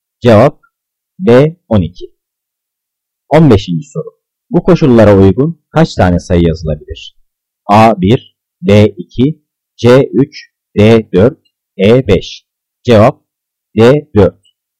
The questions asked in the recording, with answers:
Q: Bu koşullara uygun kaç tane sayı yazılabilir?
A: Cevap D 4.